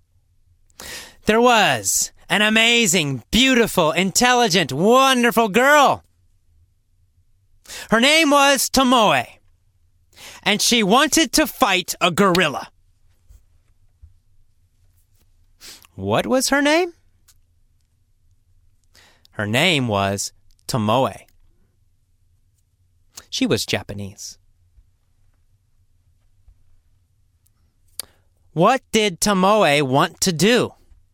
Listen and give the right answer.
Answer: Tomoe wanted to fight a gorilla.